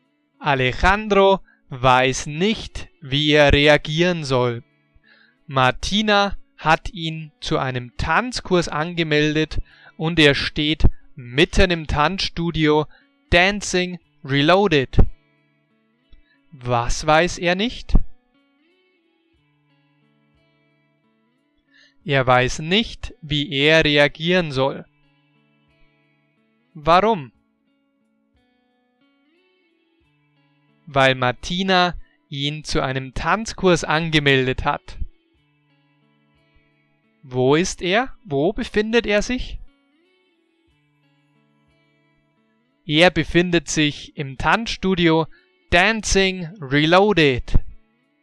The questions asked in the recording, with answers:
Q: Was weiß er nicht?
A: Er weiß nicht, wie er reagieren soll.

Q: Warum?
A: Weil Martina ihn zu einem Tanzkurs angemeldet hat.